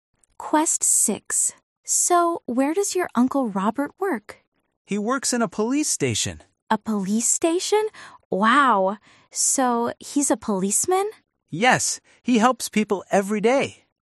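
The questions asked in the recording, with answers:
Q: So, where does your Uncle Robert work?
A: in a police station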